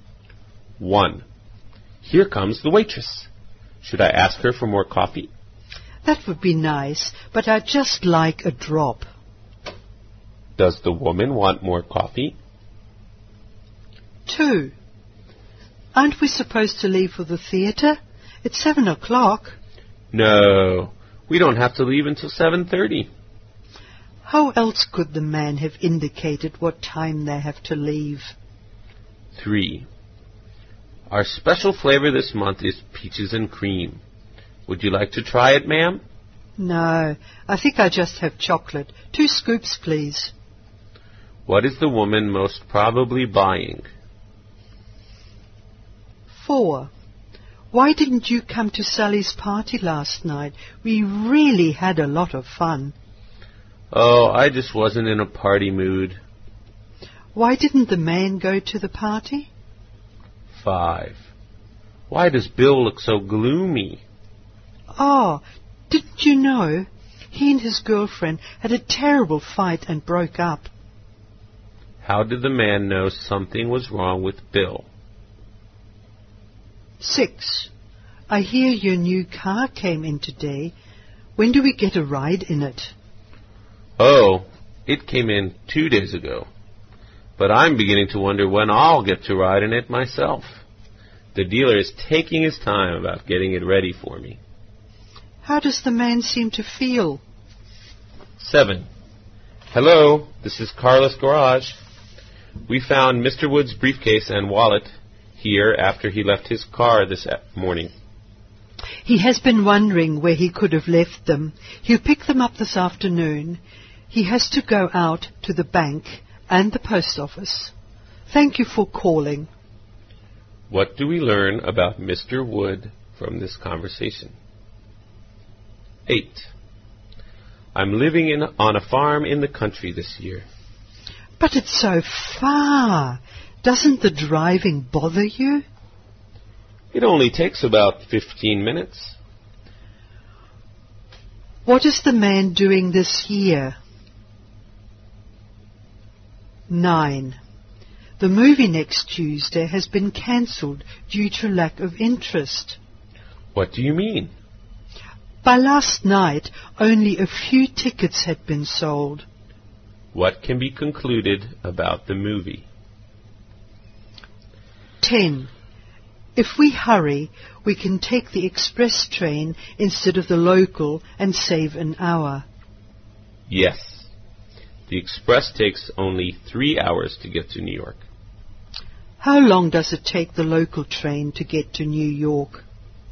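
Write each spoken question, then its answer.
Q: Does the woman want more coffee?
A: Yes, but just a little

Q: How else could the man have indicated what time they have to leave?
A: At half past seven

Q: What is the woman most probably buying?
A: Chocolate ice cream

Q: Why didn't the man go to the party?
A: He wasn't in a party mood

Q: What is the man doing this year?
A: Living on a farm in the country

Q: What can be concluded about the movie?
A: Few people were interested, so it was cancelled

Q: How long does it take the local train to get to New York?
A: Four hours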